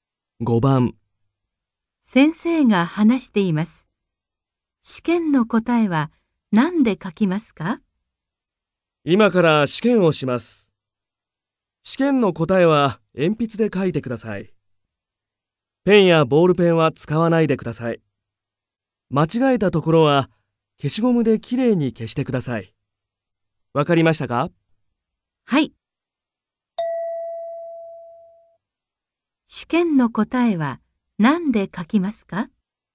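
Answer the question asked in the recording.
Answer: 鉛筆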